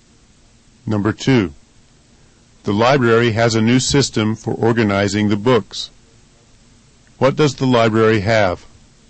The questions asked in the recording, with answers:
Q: What does the library have?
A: The library has a new system or method for organizing the books.